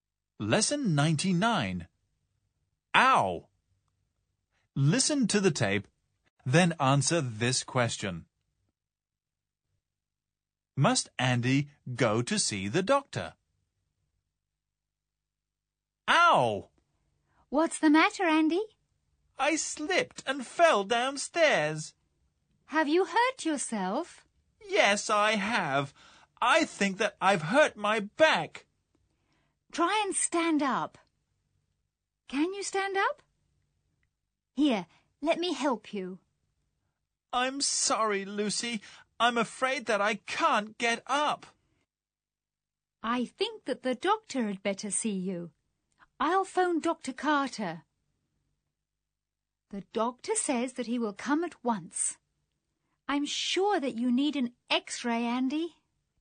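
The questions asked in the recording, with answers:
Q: Must Andy go to see the doctor?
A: No, the doctor will come to see him at once.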